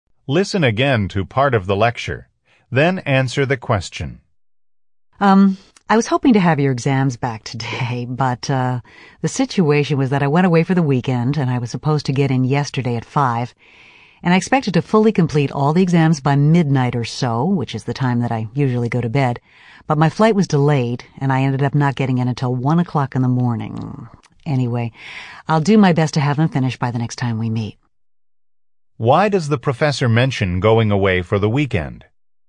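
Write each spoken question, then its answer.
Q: Why does the professor mention going away for the weekend?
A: To explain why he hasn't finished grading the exams: his flight back was delayed.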